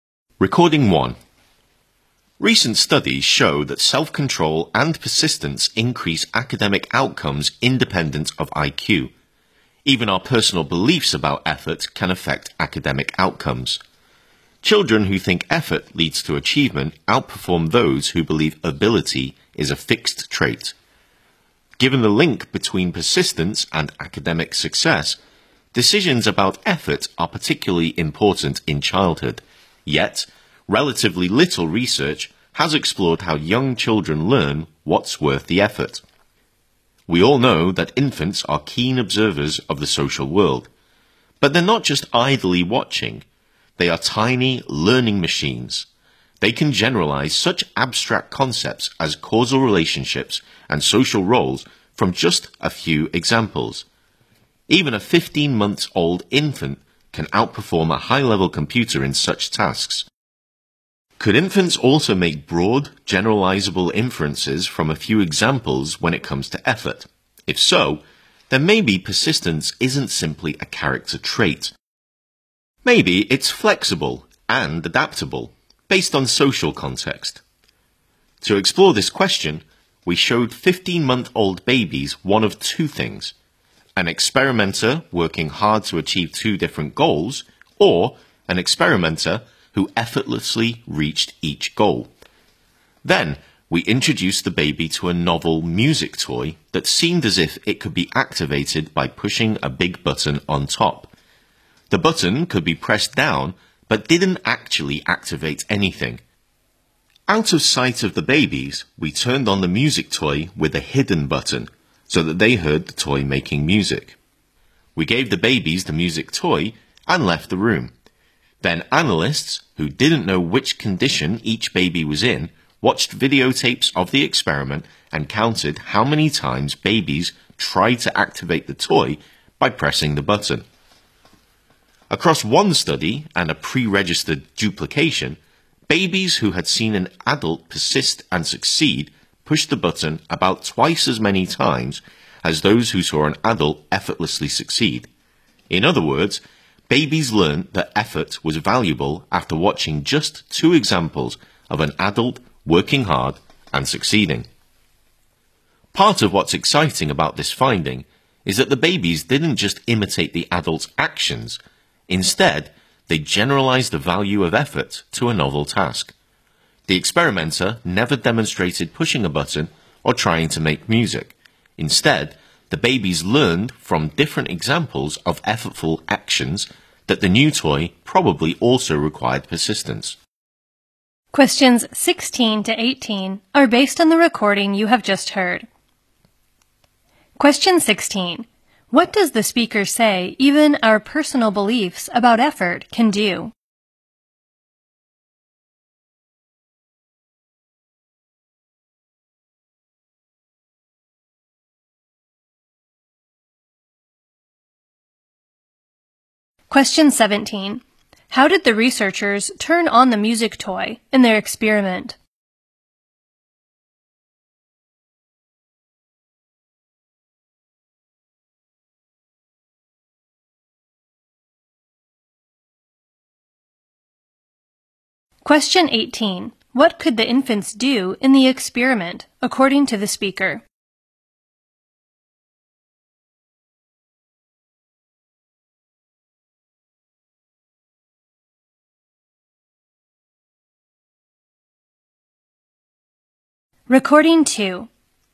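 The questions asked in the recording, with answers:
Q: What does the speaker say even our personal beliefs about effort can do?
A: Affect academic outcomes.

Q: How did the researchers turn on the music toy in their experiment?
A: With a hidden button, out of the babies' sight.

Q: What could the infants do in the experiment, according to the speaker?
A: Generalize the value of effort to a new task.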